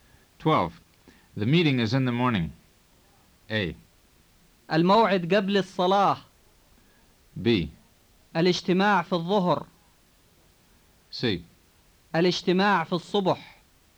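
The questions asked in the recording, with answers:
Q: The meeting is in the morning.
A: C: الاجتماع في الصبح.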